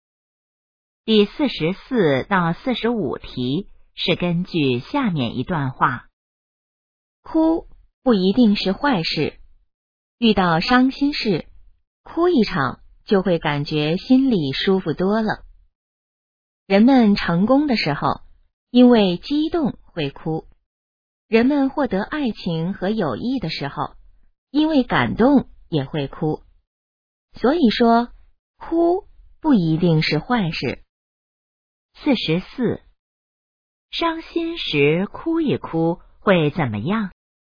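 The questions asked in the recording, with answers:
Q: 伤心时哭一哭会怎么样?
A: 心里会感觉舒服多了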